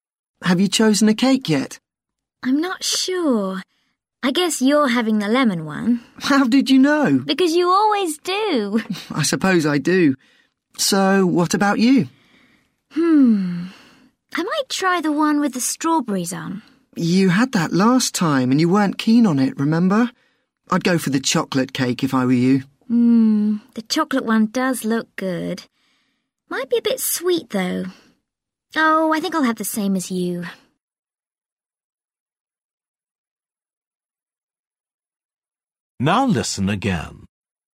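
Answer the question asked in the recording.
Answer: the lemon cake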